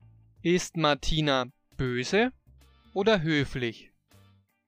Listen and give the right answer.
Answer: Sie ist höflich. Martina ist höflich.